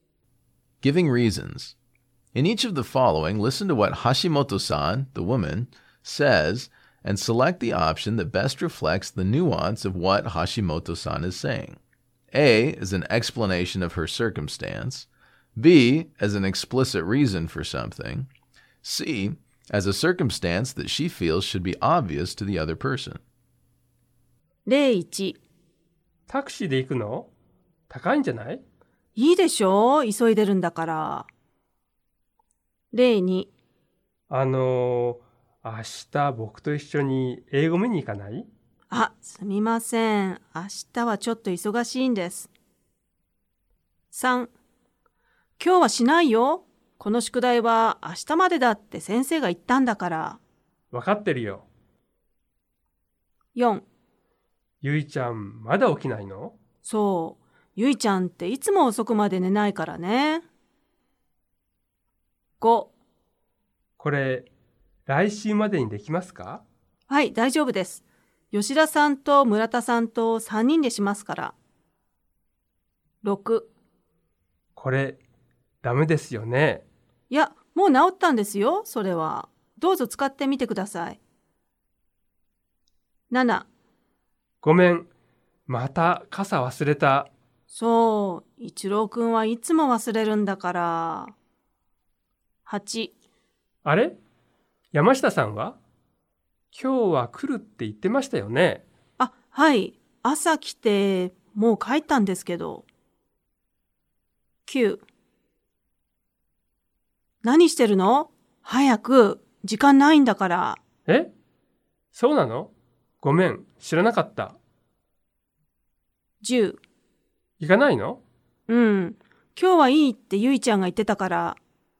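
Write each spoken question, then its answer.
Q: この宿題は明日までだって先生が言ったんだから。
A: C: a circumstance that she feels should be obvious to the other person

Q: はい、大丈夫です。吉田さんと村田さんと3人でしますから。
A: B: an explicit reason for something

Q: いや、もう治ったんですよ、それは。どうぞ使ってみてください。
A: A: an explanation of her circumstance

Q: そう、一郎くんはいつも忘れるんだから。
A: C: a circumstance that she feels should be obvious to the other person

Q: あ、はい。朝来て、もう帰ったんですけど。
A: A: an explanation of her circumstance

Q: 何してるの?早く、時間ないんだから。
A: C: a circumstance that she feels should be obvious to the other person

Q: うん、今日はいいってゆいちゃんが言ってたから。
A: B: an explicit reason for something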